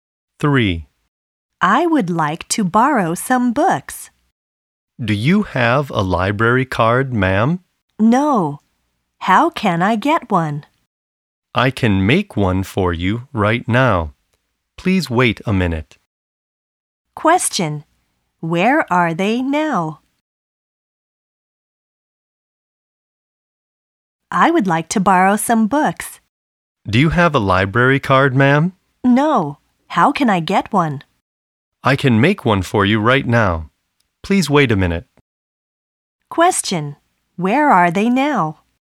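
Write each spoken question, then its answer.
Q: Where are they now?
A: In a library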